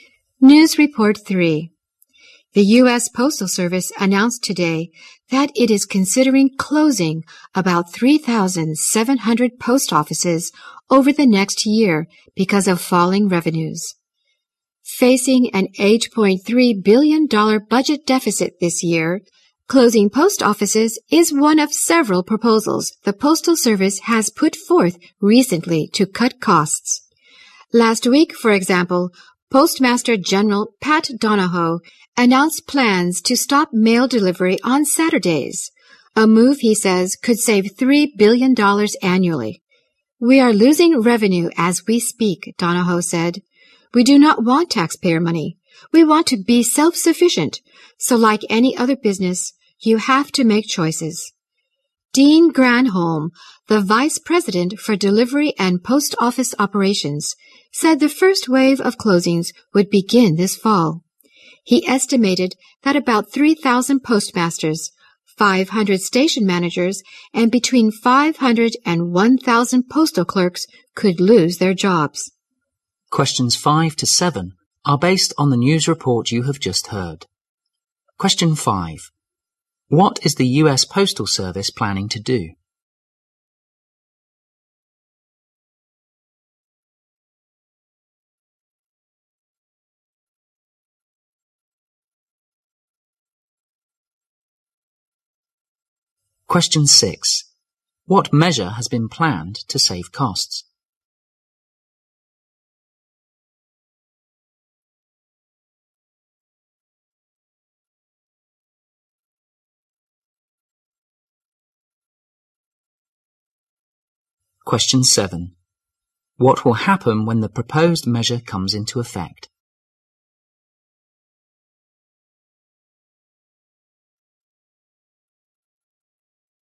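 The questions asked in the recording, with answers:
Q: What is the U.S. Postal Service planning to do?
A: Close about 3,700 post offices

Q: What measure has been planned to save costs?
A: Stop mail delivery on Saturdays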